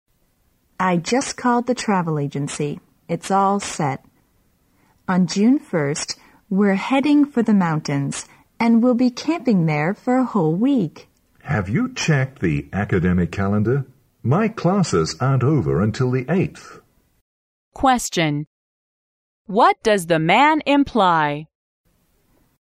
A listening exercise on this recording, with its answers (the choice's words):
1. What does the man imply?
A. They might have to change their plan.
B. He has got everything set for their trip.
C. He has a heavier workload than the woman.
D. They could stay in the mountains until June 8.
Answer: They might have to change their plan.

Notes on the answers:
考点:推理题。女士计划6月1日去游玩,而男士说Have you checked the academic calendar? My classes aren't over until the 8th,由此可知他们或许需要改变原计划。

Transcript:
W: I just called the travel agency. It's all set. On June 1st, we are heading for the mountains, and we'll be camping there for a whole week.
M: Have you checked the academic calendar? My classes aren't over until the 8th.
Question: What does the man imply?